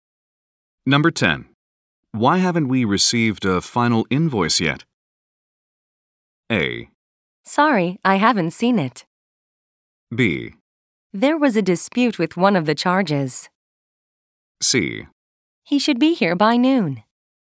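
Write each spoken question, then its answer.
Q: Why haven't we received a final invoice yet?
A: B: There was a dispute with one of the charges.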